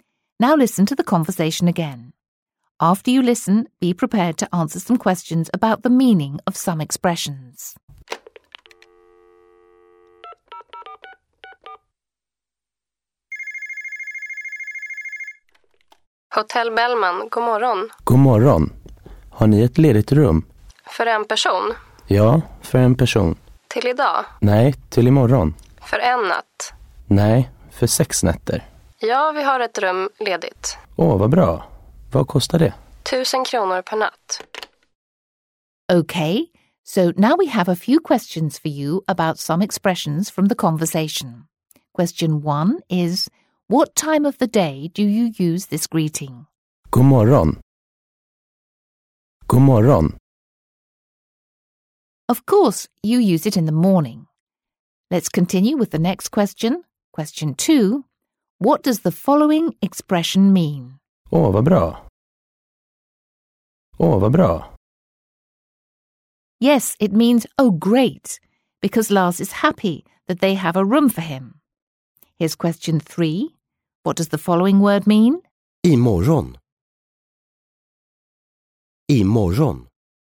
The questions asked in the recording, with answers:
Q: what time of the day do you use this greeting?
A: Of course, you use it in the morning.

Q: What does the following expression mean?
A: Yes, it means, oh great